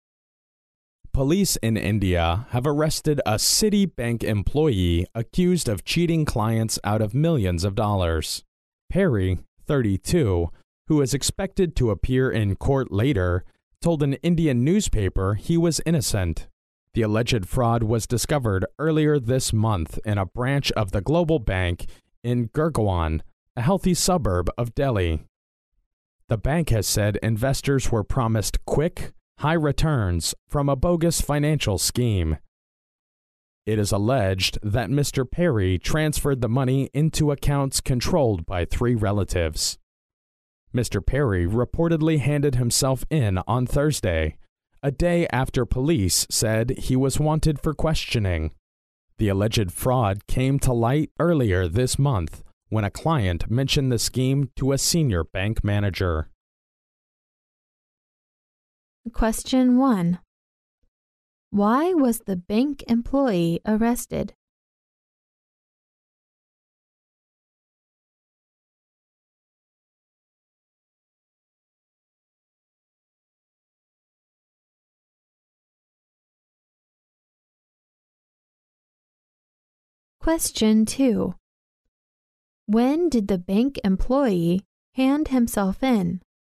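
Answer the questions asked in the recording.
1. He was accused of cheating clients out of millions of dollars.
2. On Thursday, a day after police said he was wanted for questioning.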